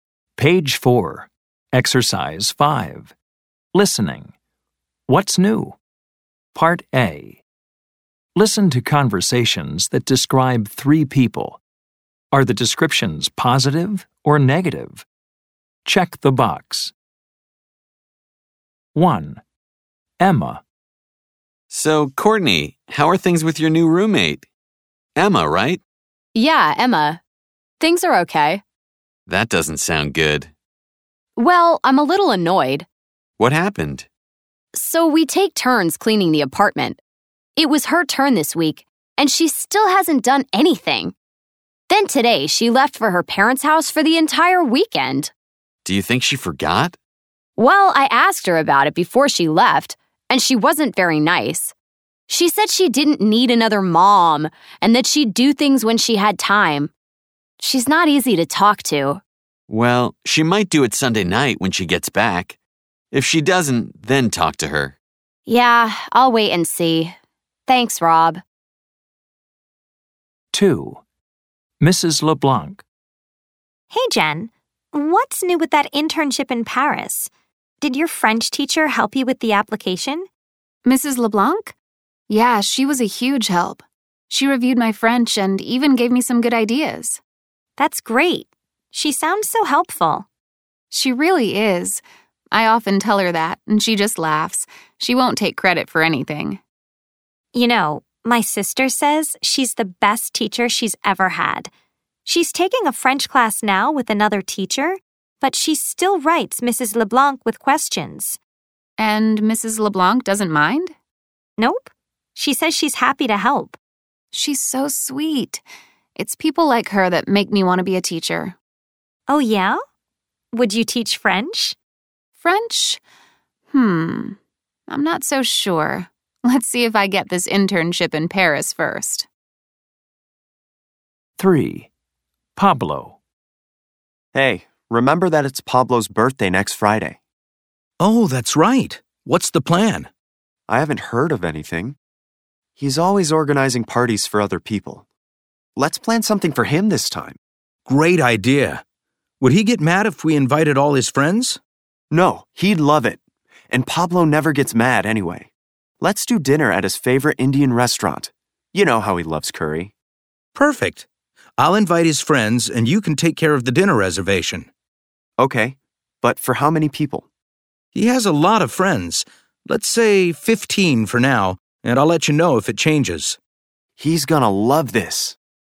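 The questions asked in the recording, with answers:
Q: Are the descriptions positive or negative?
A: Emma: negative

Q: Are the descriptions positive or negative?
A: Mrs. LeBlanc: positive

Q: Are the descriptions positive or negative?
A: Pablo: positive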